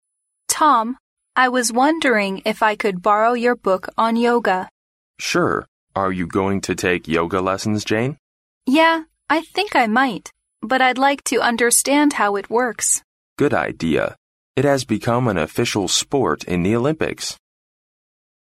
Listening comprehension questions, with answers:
Why does Jane borrow Tom's yoga book?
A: She wants to learn some basic principles of the sport.

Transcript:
W: Tom, I was wondering if I could borrow your book on yoga.
M: Sure. Are you going to take yoga lessons, Jane?
W: Yeah, I think I might, but I'd like to understand how it works.
M: Good idea. It has become an official sport in the Olympics.